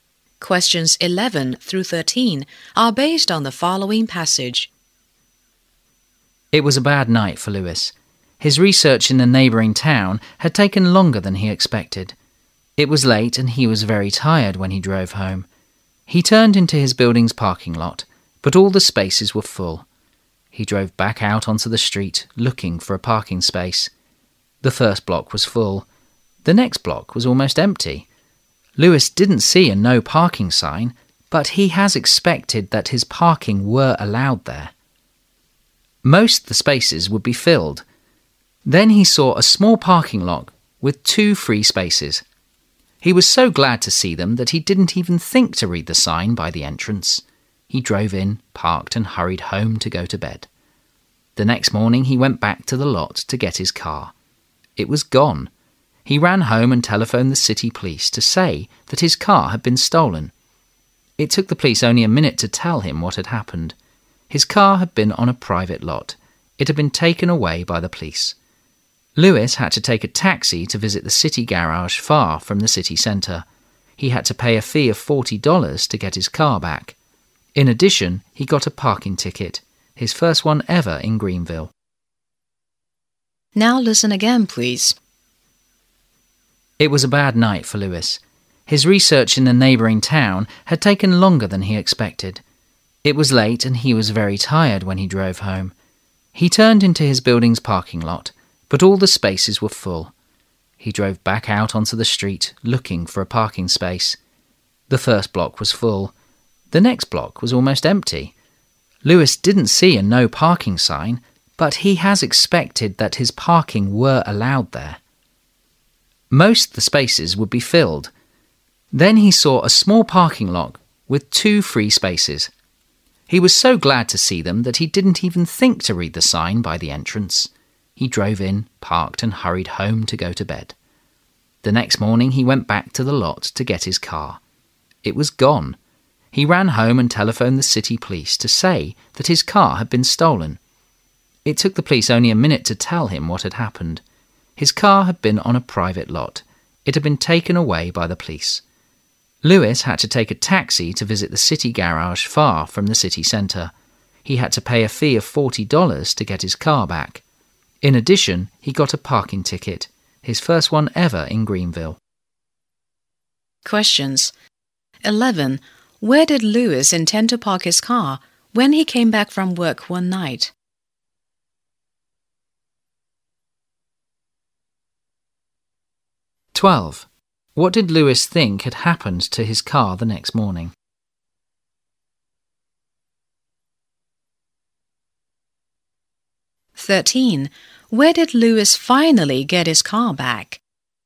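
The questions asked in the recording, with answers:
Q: Where did Lewis intend to park his car when he came back from work one night?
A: In his building's parking lot

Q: What did Lewis think had happened to his car the next morning?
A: It had been stolen

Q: Where did Lewis finally get his car back?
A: At the city garage far from the city centre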